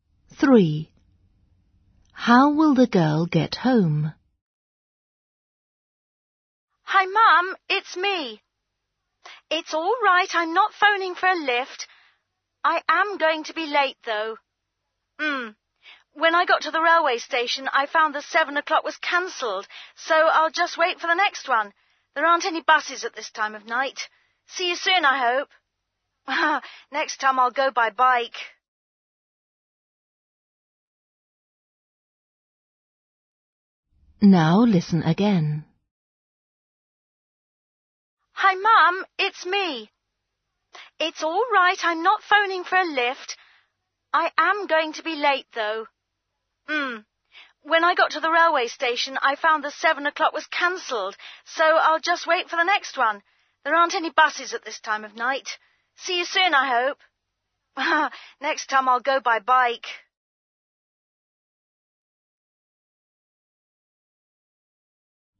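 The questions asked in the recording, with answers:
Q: How will the girl get home?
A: by train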